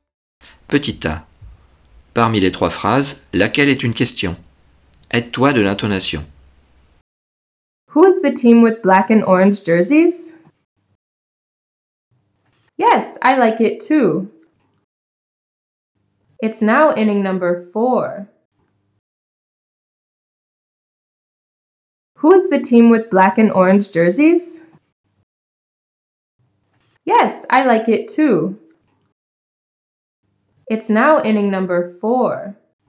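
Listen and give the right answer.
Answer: Who's the team with black and orange jerseys?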